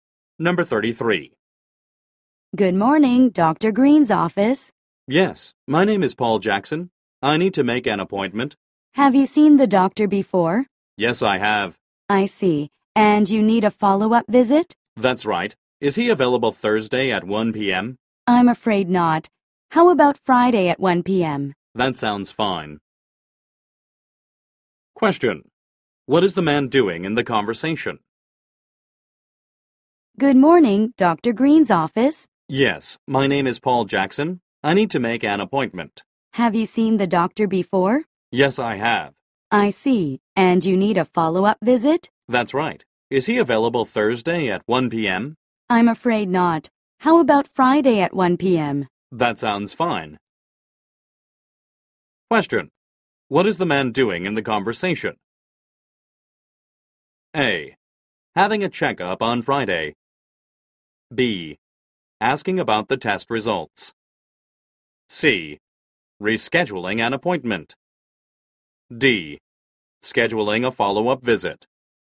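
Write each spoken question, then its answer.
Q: What is the man doing in the conversation?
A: D: Scheduling a follow-up visit.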